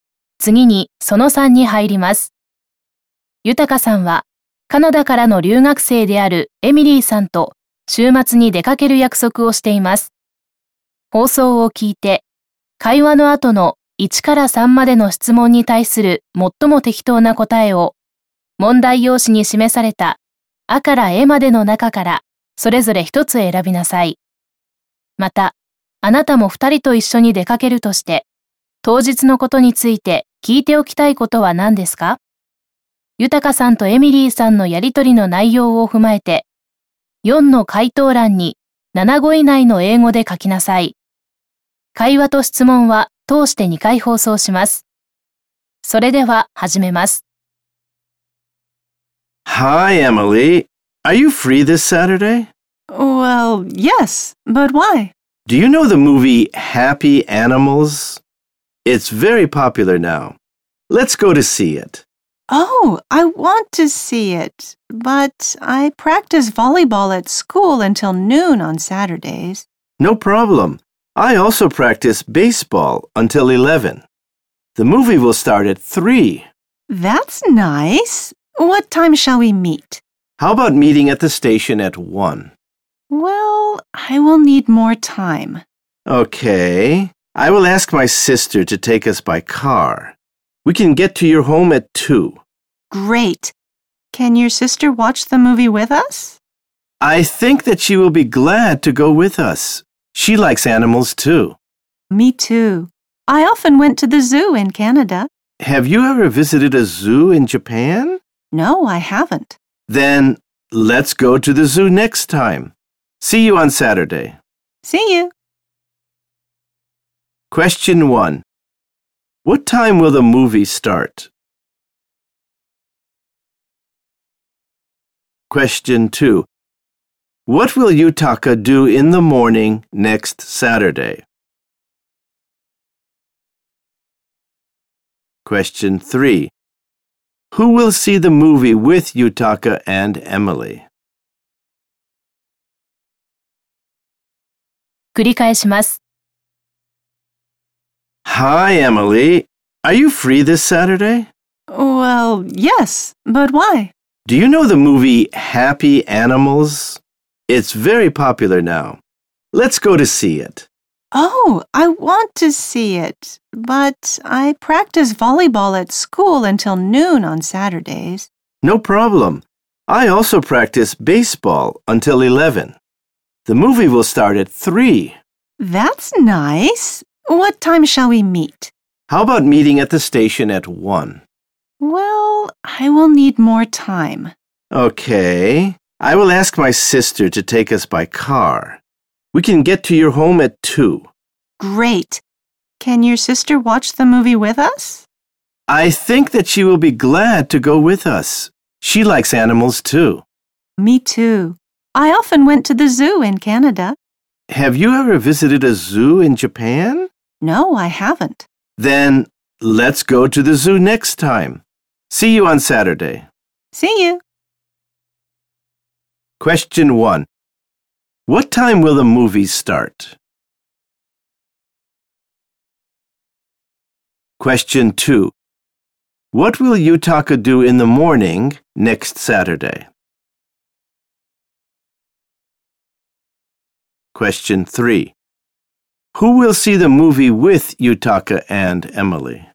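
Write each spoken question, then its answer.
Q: Question 1. What time will the movie start?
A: At 3.

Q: Question 2. What will Yutaka do in the morning next Saturday?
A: He will practice baseball.

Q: Question 3. Who will see the movie with Yutaka and Emily?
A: Yutaka's sister.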